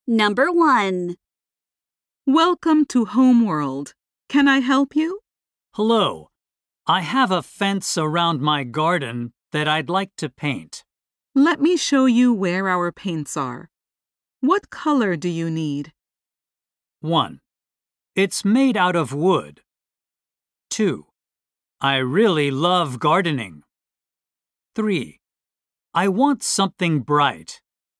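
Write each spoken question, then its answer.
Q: What color do you need?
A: 3: I want something bright.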